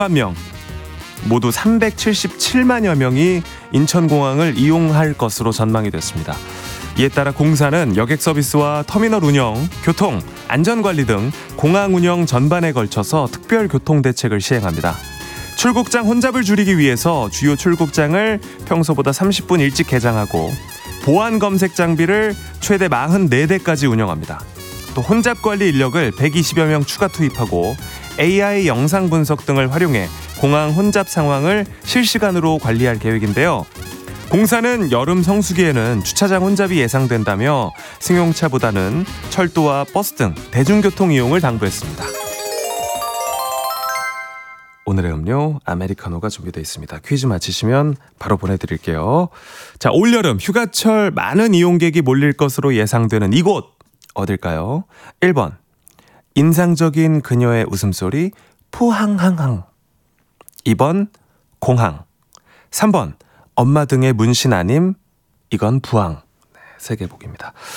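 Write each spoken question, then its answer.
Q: 자, 올여름 휴가철 많은 이용객이 몰릴 것으로 예상되는 이곳 어딜까요?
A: 2: 공항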